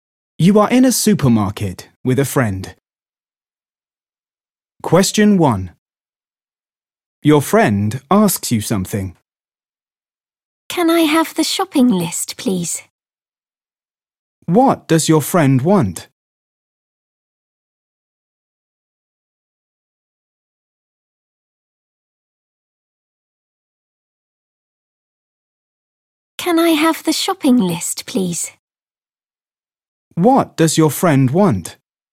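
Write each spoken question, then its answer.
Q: What does your friend want?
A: the shopping list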